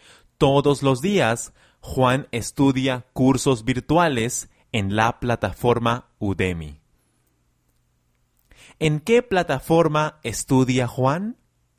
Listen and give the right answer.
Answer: En Udemy, Juan estudia sus cursos virtuales en la plataforma Udemy.